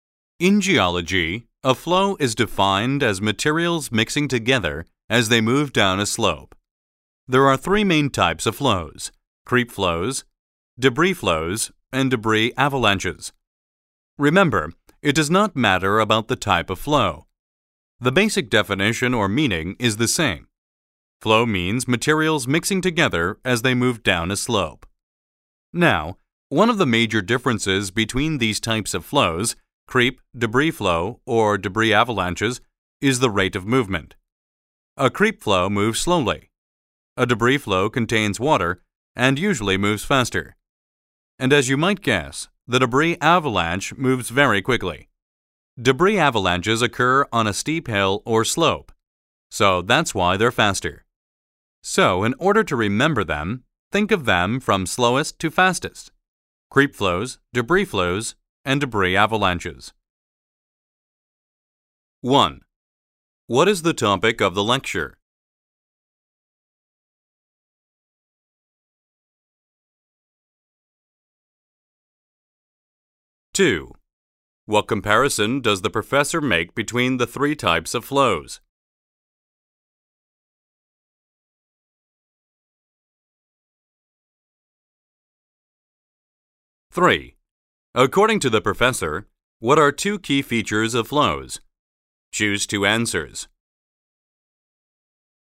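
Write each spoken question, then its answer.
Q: What is the topic of the lecture?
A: Flows in geology and their three main types

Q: What comparison does the professor make between the three types of flows?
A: Their rate of movement: creep flows are slowest, debris flows faster, debris avalanches fastest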